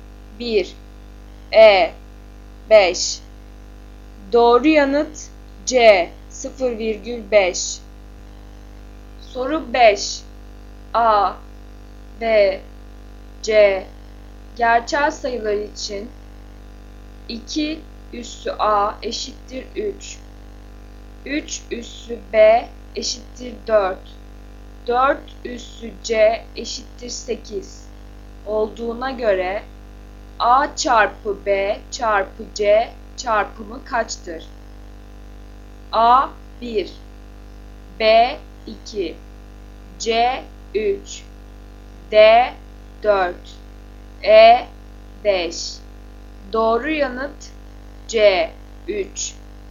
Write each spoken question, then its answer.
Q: A çarpı B çarpı C çarpımı kaçtır?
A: Doğru yanıt C 3.